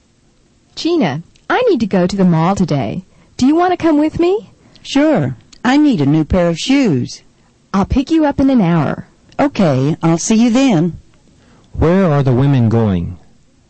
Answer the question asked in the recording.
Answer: They're going to the mall.